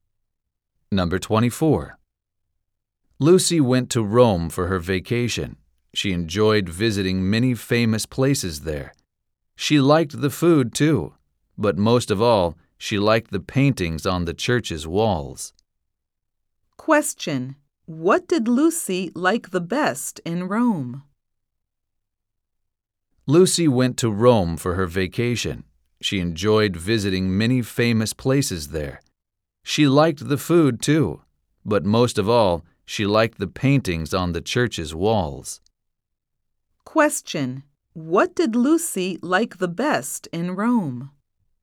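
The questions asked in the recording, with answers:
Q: What did Lucy like the best in Rome?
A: The paintings on the church's walls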